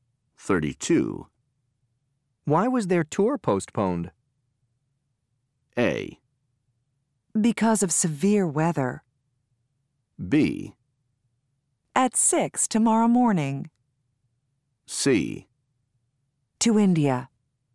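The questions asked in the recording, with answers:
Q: Why was their tour postponed?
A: A: Because of severe weather.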